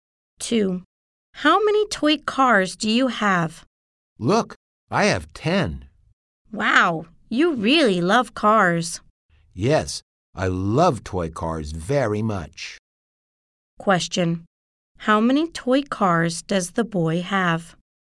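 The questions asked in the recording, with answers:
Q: How many toy cars does the boy have?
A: 10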